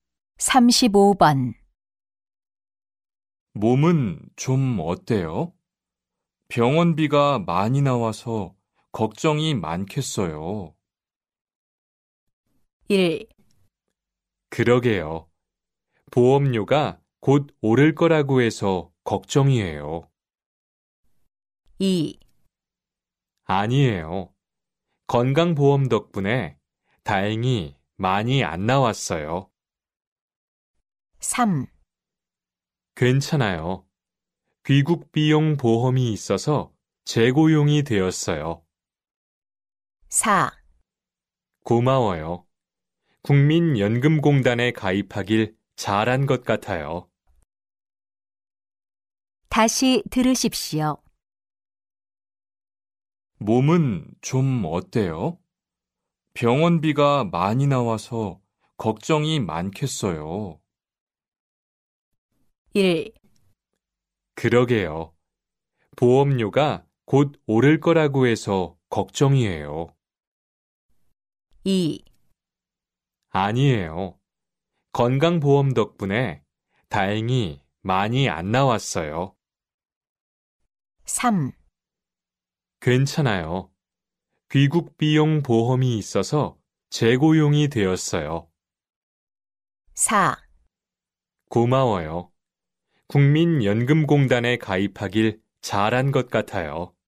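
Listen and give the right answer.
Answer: 2: 아니에요. 건강보험 덕분에 다행히 많이 안 나왔어요.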